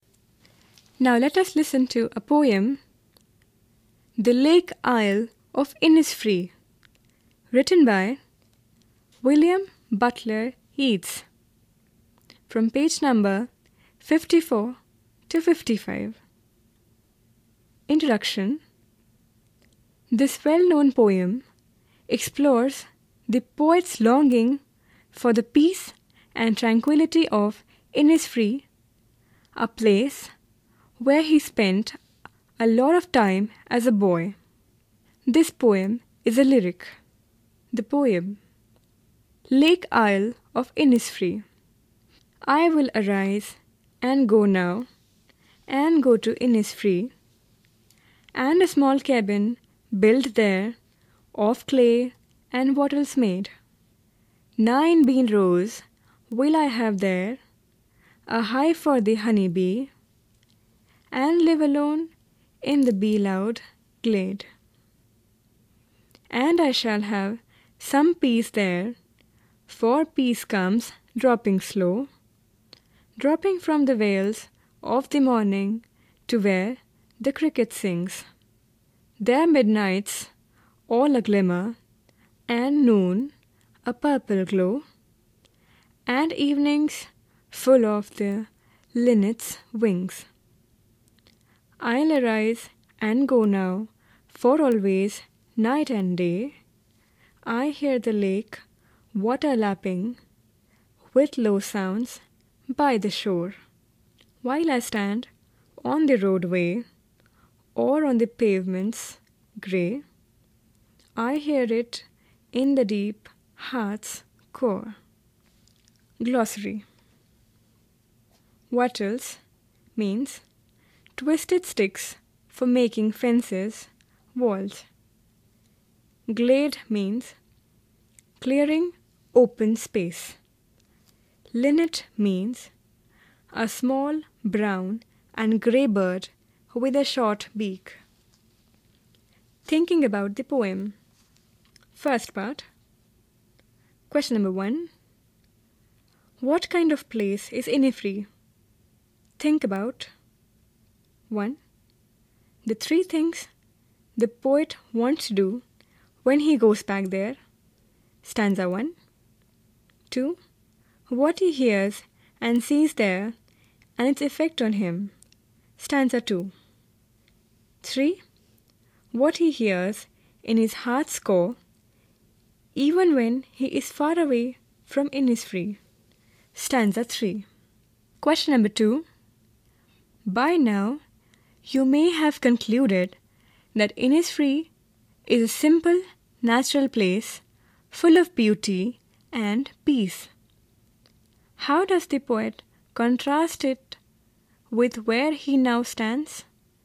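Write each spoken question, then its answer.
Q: What kind of place is Innisfree?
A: A simple, natural, peaceful and beautiful place

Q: How does the poet contrast it with where he now stands?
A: He now stands on the roadway or the grey pavements of a city, far from the peace of nature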